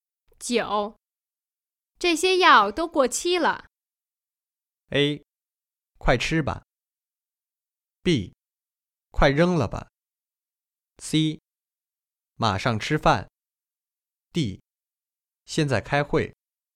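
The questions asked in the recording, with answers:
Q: 这些药都过期了。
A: B: 快扔了吧。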